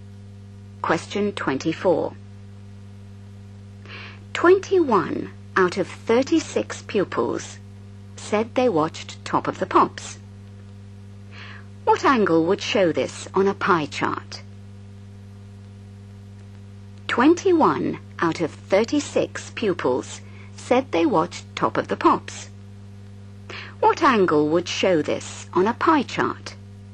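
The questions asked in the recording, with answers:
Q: What angle would show this on a pie chart?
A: 210 degrees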